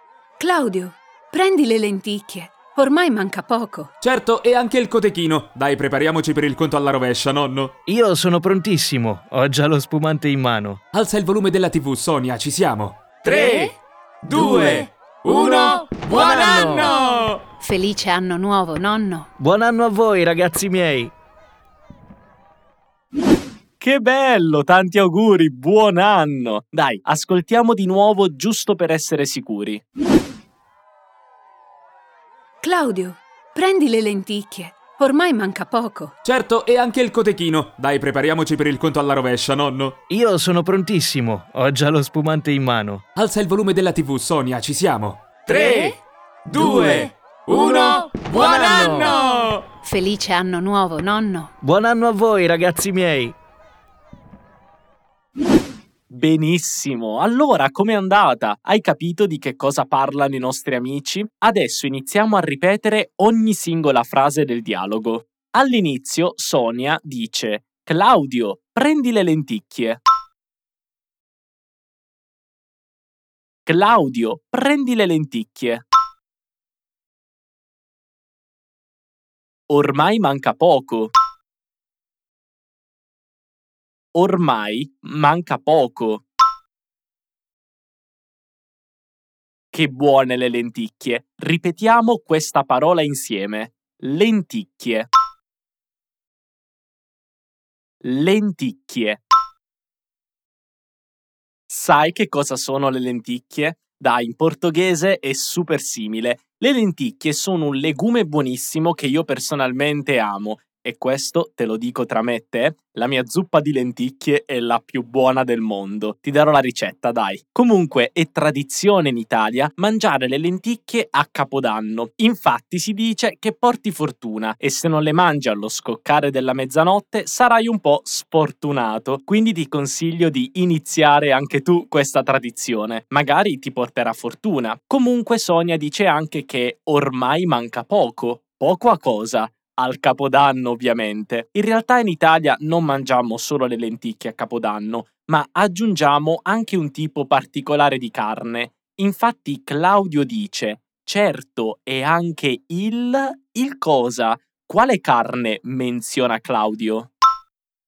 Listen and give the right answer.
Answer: Il cotechino.